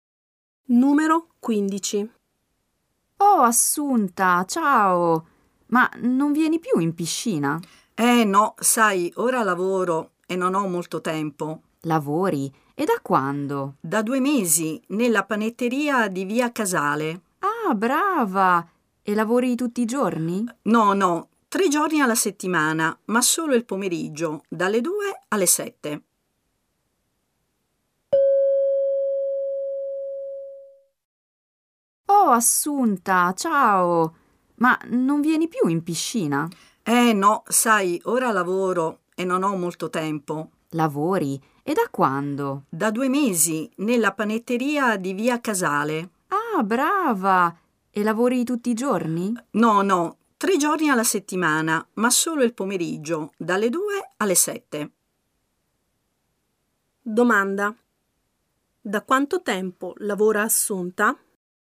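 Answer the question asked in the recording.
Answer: Da 2 mesi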